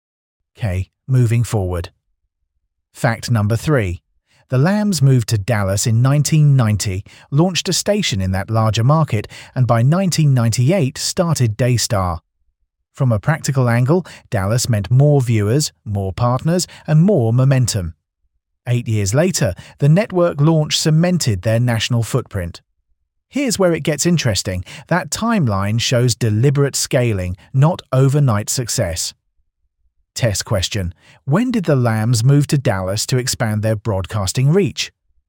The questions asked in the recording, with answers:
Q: When did the Lambs move to Dallas to expand their broadcasting reach?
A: Correct answer, 1990.